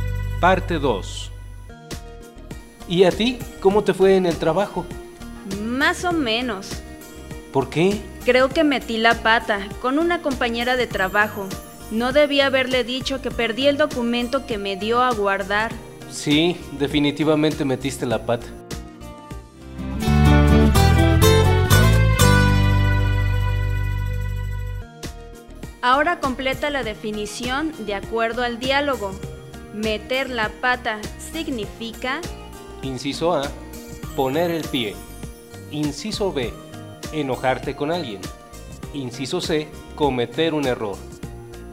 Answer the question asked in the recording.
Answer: Meter la pata significa Respuesta, inciso C.